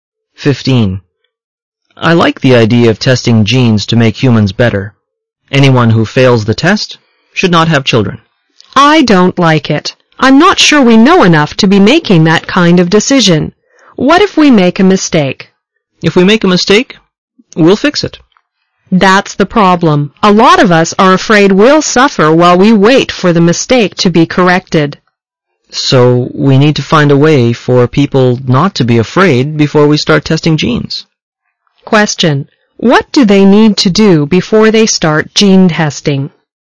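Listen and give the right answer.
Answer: Find a way for people not to be afraid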